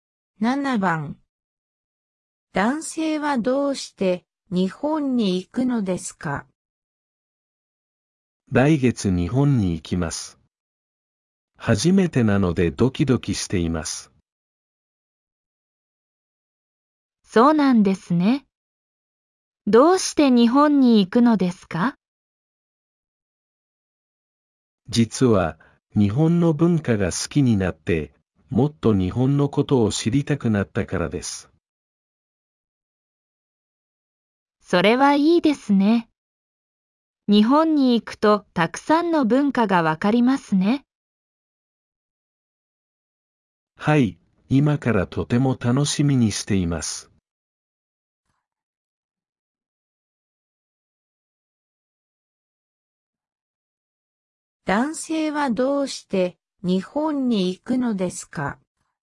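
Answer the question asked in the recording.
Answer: 日本の文化が好きになって、もっと日本のことを知りたくなったから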